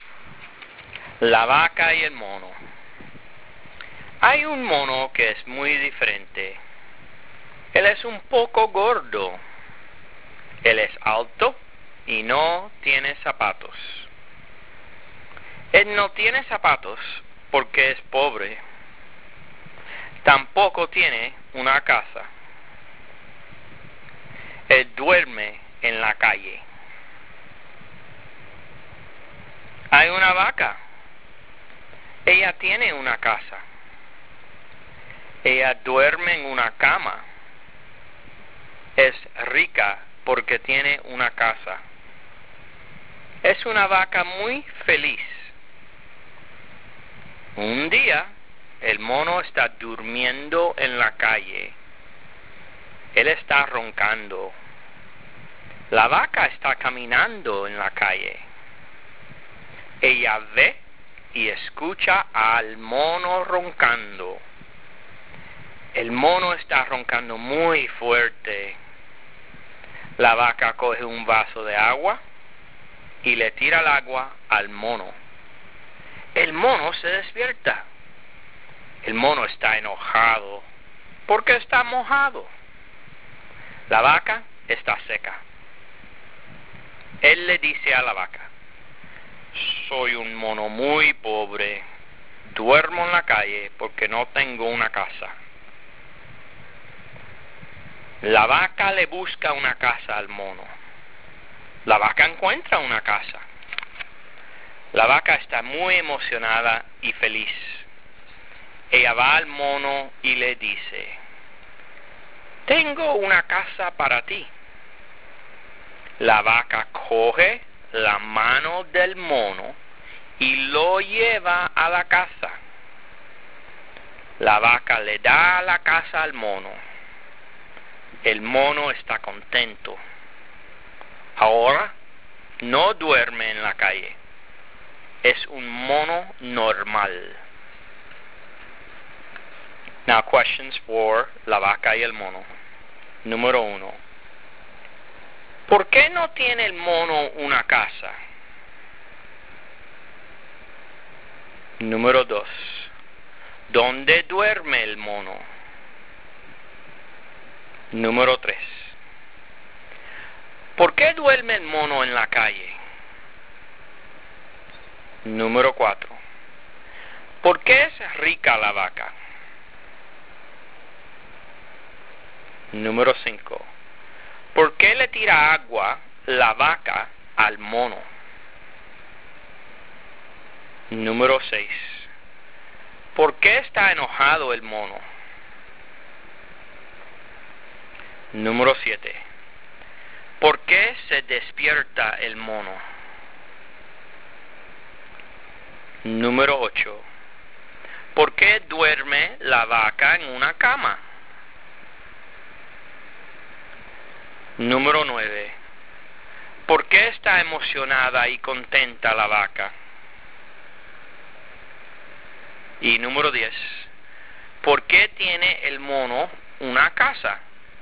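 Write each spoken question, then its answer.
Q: ¿Por qué no tiene el mono una casa?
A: Porque es pobre

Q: ¿Dónde duerme el mono?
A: En la calle

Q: ¿Por qué duerme el mono en la calle?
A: Porque no tiene una casa

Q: ¿Por qué es rica la vaca?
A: Porque tiene una casa

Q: ¿Por qué le tira agua la vaca al mono?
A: Porque el mono está roncando muy fuerte

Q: ¿Por qué está enojado el mono?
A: Porque está mojado

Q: ¿Por qué se despierta el mono?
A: Porque la vaca le tira agua

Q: ¿Por qué está emocionada y contenta la vaca?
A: Porque encuentra una casa para el mono

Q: ¿Por qué tiene el mono una casa?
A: Porque la vaca le da una casa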